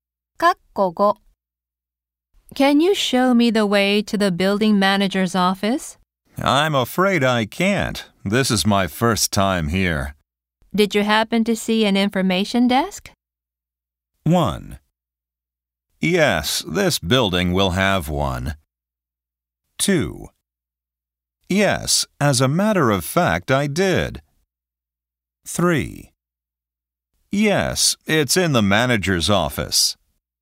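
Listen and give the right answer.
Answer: 2: Yes, as a matter of fact, I did.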